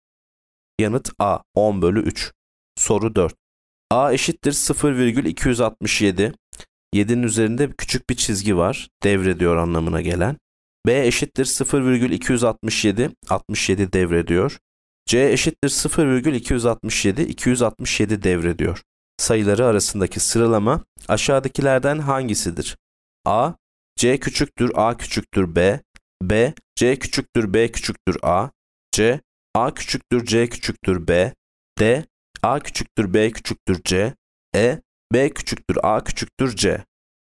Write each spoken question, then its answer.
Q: Sayıları arasındaki sıralama aşağıdakilerden hangisidir?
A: Yanıt B. C küçüktür, B küçüktür, A.